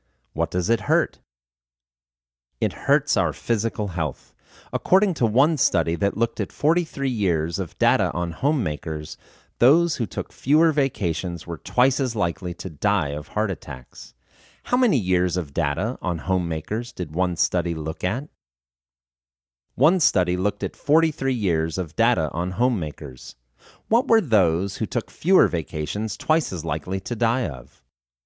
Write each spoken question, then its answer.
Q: What were those who took fewer vacations twice as likely to die of?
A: Those who took fewer vacations were twice as likely to die of heart attacks.